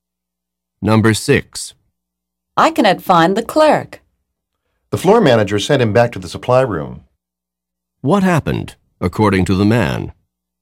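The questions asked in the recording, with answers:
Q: What happened, according to the man?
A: The floor manager sent the clerk to the supply room.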